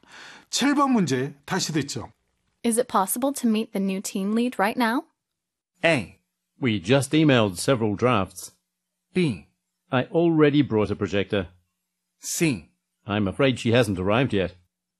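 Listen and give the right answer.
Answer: C: I'm afraid she hasn't arrived yet.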